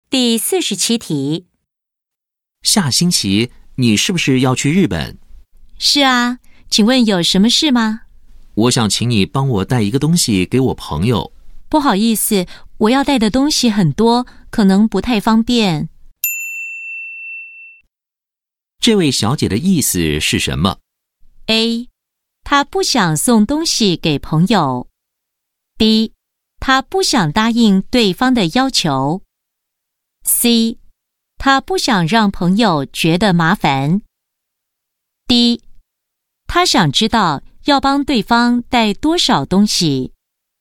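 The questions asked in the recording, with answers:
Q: 这位小姐的意思是什么?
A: B: 她不想答应对方的要求。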